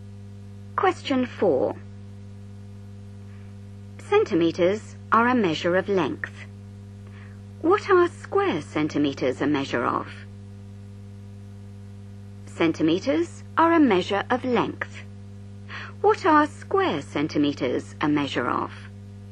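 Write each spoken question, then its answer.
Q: What are square centimeters a measure of?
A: area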